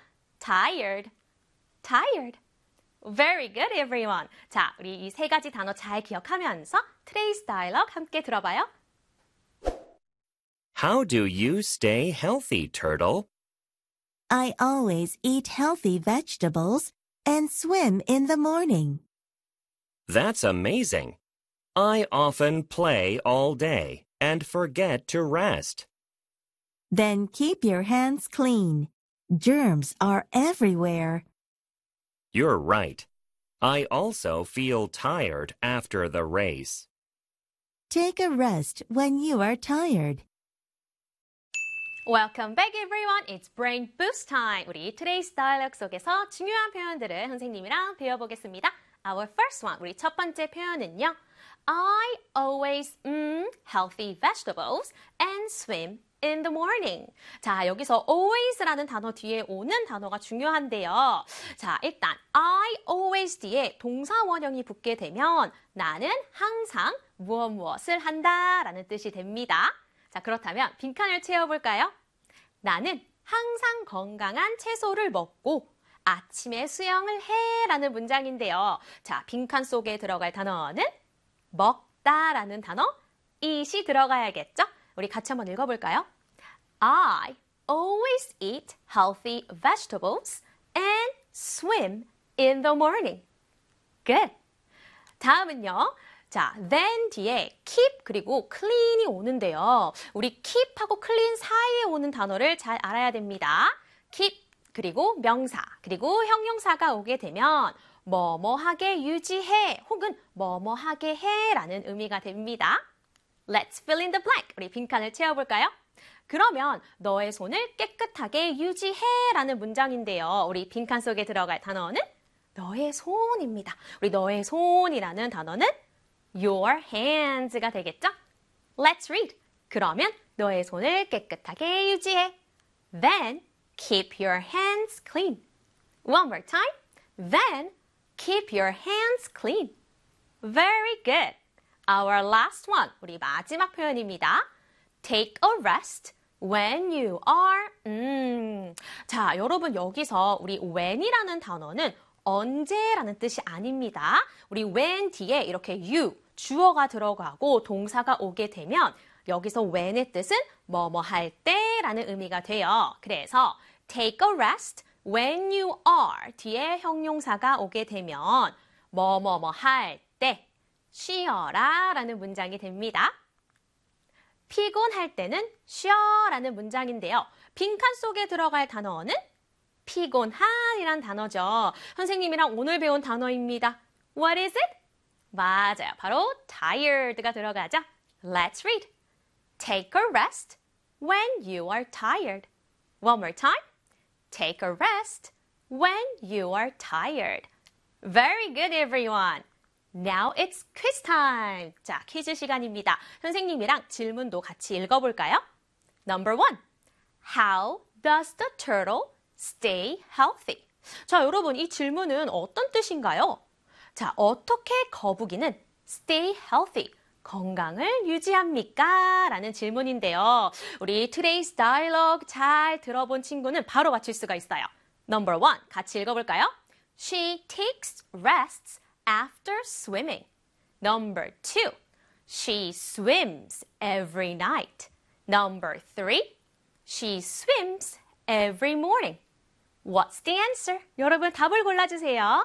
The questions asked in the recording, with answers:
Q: How does the turtle stay healthy?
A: The answer is number three입니다.